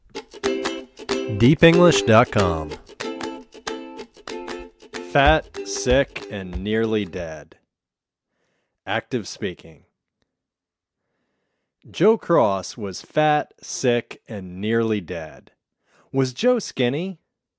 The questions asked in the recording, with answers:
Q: Was Joe skinny?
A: No, he wasn't skinny. He was fat.